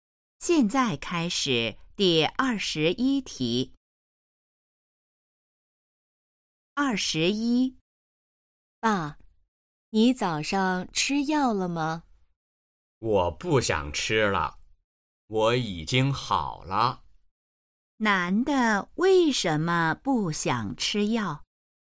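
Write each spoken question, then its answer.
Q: 男的为什么不想吃药?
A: 他已经好了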